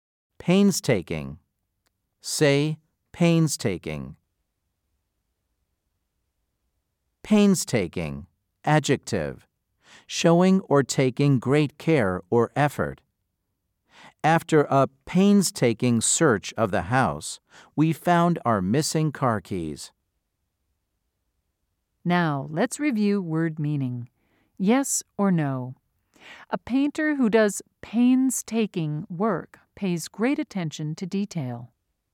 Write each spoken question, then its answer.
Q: Yes or no? A painter who does painstaking work pays great attention to detail.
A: If you said yes, you are correct.